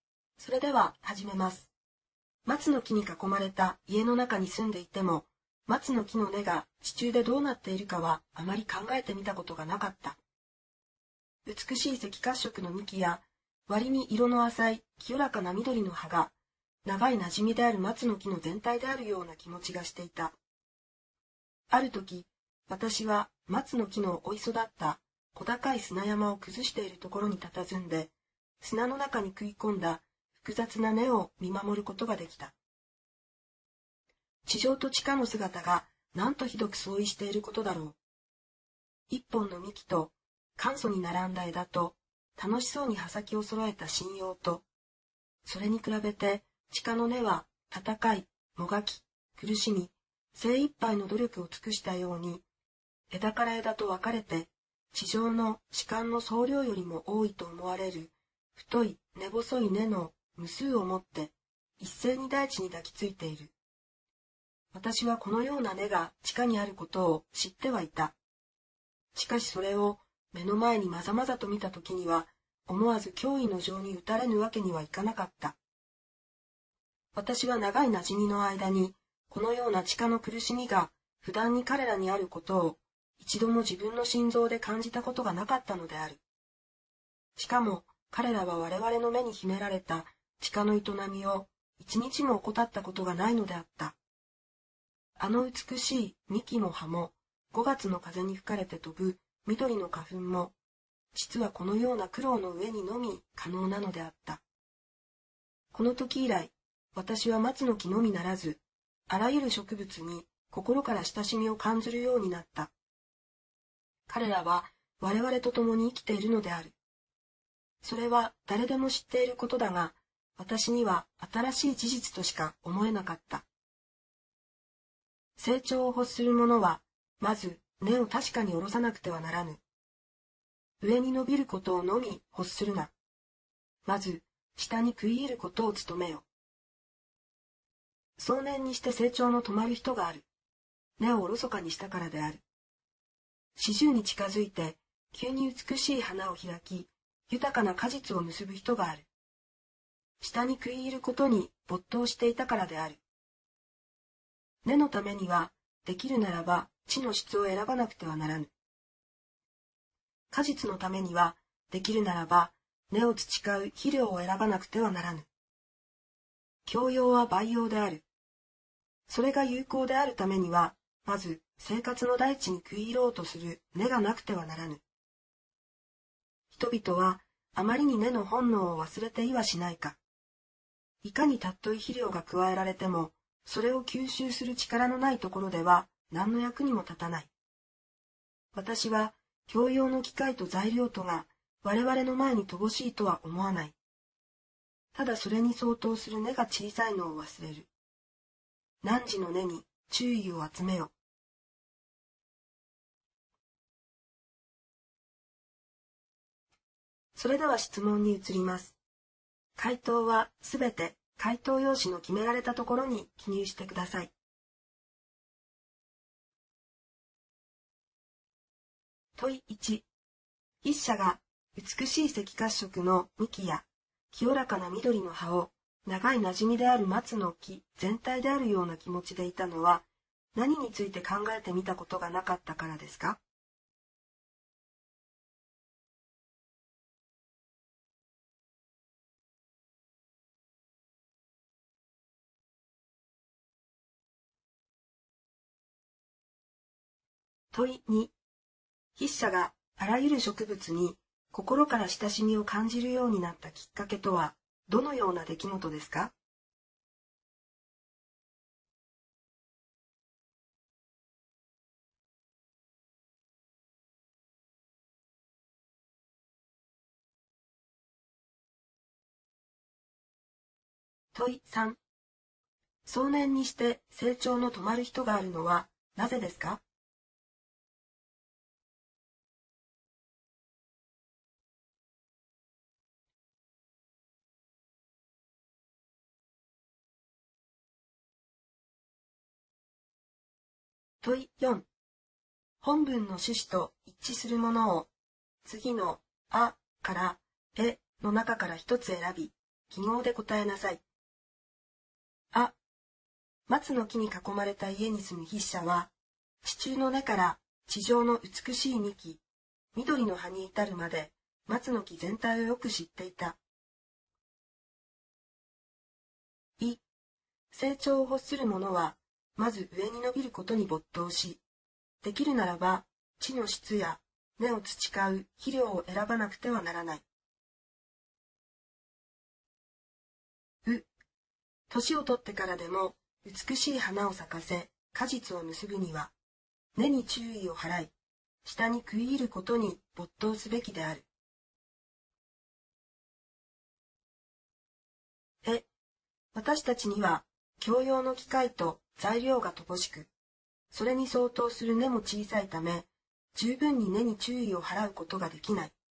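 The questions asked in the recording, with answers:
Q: 筆者が 美しい赤褐色の幹や清らかな緑の葉を長い馴染みである松の木全体であるような気持ちでいたのは、何について考えてみたことがなかったからですか?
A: 松の木の根が地中でどうなっているか

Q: 筆者があらゆる植物に心から親しみを感じるようになったきっかけとは、どのような出来事ですか?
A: 砂山を崩しているところで、砂の中に食い込んだ松の木の複雑な根を目の前で見たこと

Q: 少年にして成長の止まる人があるのはなぜですか?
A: 根をおろそかにしたから

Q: 本文の趣旨と一致するものを、次の「あ」から「え」の中から一つ選び、記号で答えなさい。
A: う: 年を取ってからでも美しい花を咲かせ果実を結ぶには、根に注意を払い、下に食い入ることに没頭すべきである。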